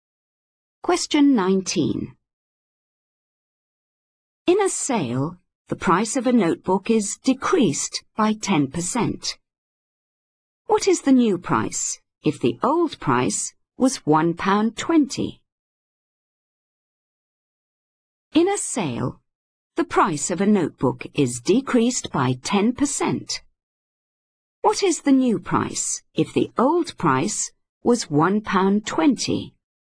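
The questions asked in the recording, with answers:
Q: What is the new price if the old price was £1.20?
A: £1.08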